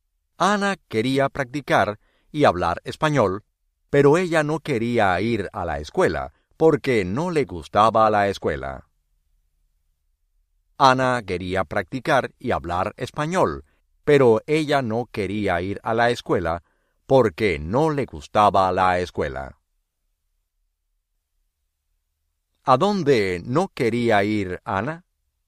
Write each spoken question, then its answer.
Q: ¿A dónde no quería ir Ana?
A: A la escuela.